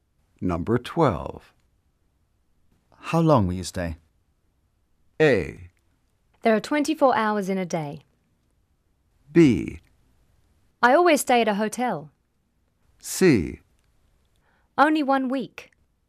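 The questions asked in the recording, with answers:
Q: How long will you stay?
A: C: Only one week.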